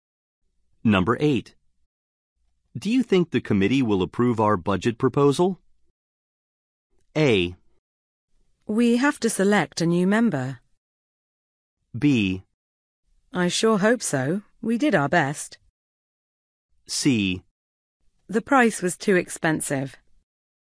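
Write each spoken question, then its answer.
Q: Do you think the committee will approve our budget proposal?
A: B: I sure hope so. We did our best.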